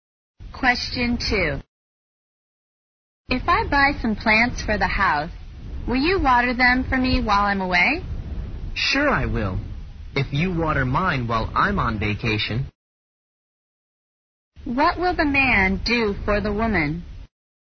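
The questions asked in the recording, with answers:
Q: What will the man do for the woman?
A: Water her plants while she is away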